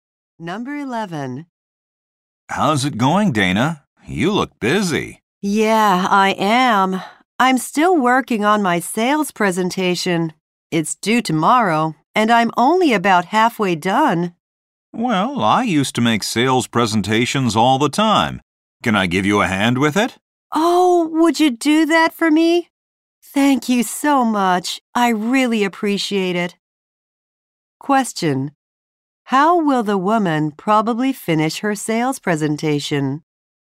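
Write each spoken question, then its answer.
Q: How will the woman probably finish her sales presentation?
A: With help from the man.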